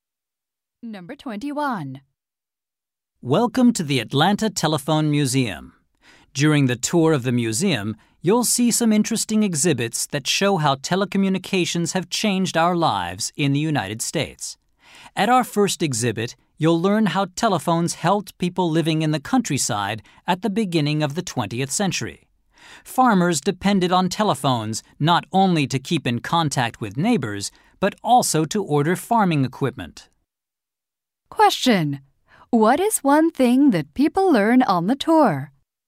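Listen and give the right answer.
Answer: How telephones helped people in the countryside in the early 20th century.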